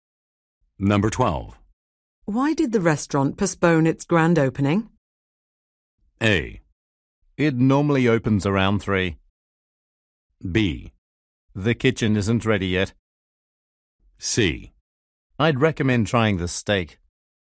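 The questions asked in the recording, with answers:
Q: Why did the restaurant postpone its grand opening?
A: B: The kitchen isn't ready yet.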